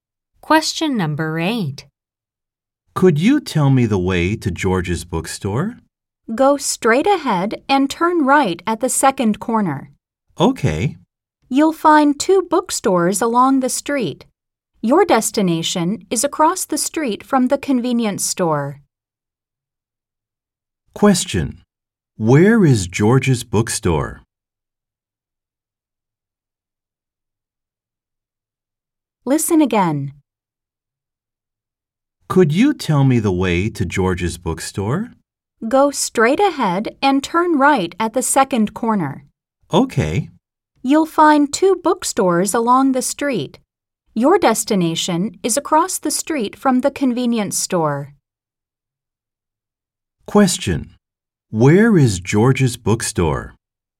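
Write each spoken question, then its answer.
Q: Where is George's bookstore?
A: Across the street from the convenience store, after turning right at the second corner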